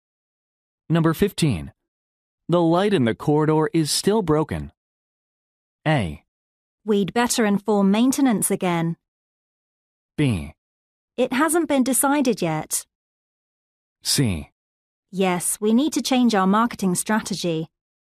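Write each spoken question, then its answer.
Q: The light in the corridor is still broken.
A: A: We'd better inform maintenance again.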